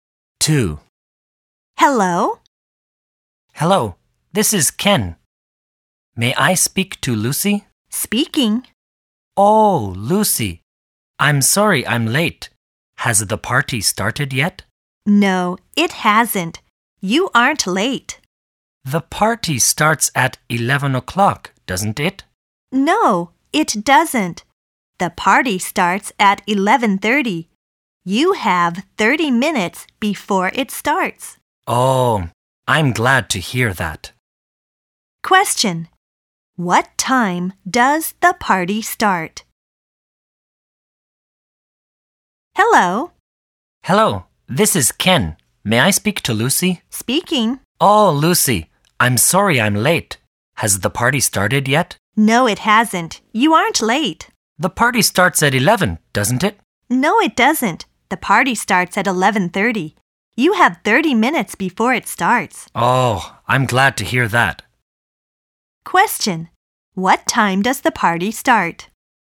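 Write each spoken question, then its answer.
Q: What time does the party start?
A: At 11:30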